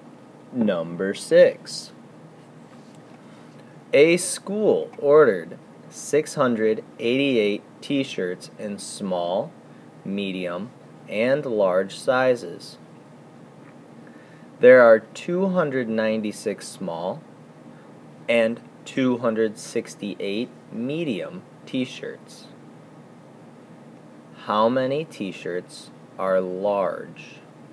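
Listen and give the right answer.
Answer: 124 t-shirts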